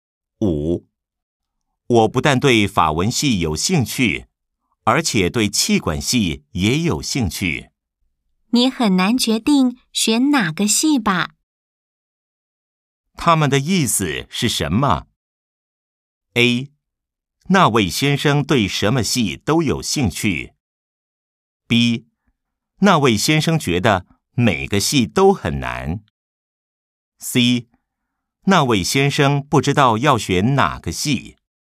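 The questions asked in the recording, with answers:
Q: 他们的意思是什么?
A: C: 那位先生不知道要选哪个系。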